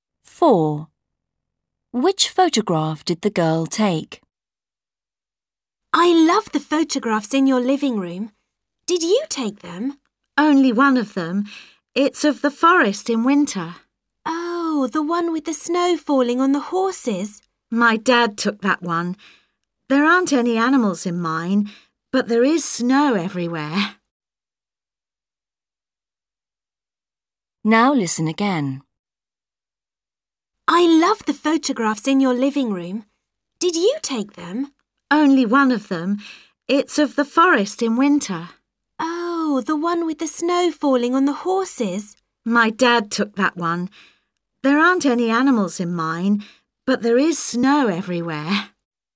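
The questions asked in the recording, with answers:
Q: Which photograph did the girl take?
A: the forest in winter with snow and no animals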